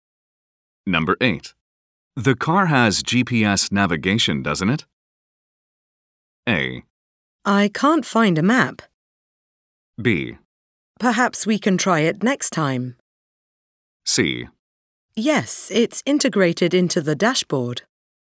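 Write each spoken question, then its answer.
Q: The car has GPS navigation, doesn't it?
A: C: Yes, it's integrated into the dashboard.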